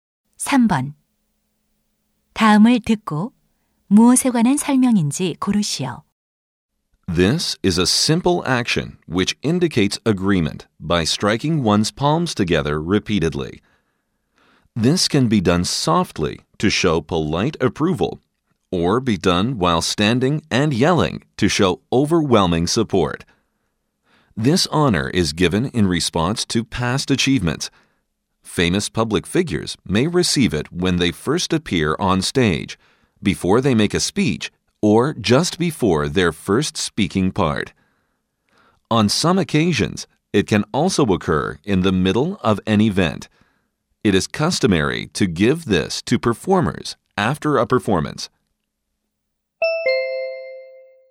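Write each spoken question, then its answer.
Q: 다음을 듣고 무엇에 관한 설명인지 고르시오.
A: 박수 (applause)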